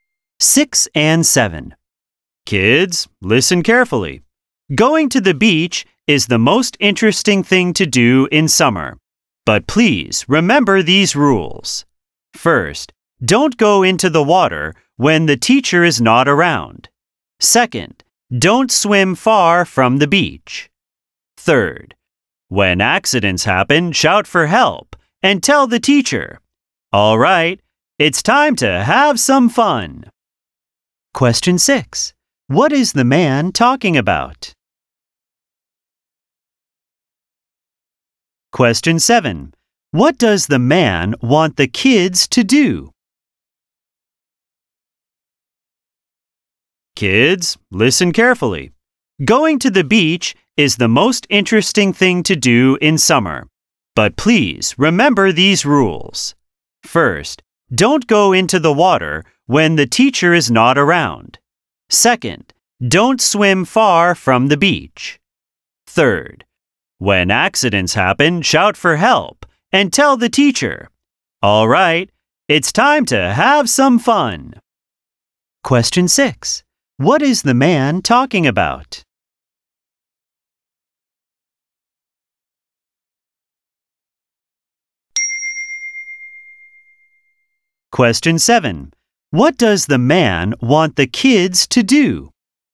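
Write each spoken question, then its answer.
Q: What is the man talking about?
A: Safety rules for going to the beach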